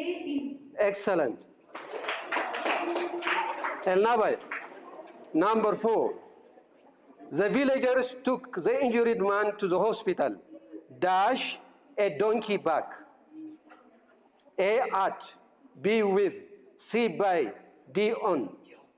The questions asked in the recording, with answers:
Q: The villagers took the injured man to the hospital.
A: D on, excellent.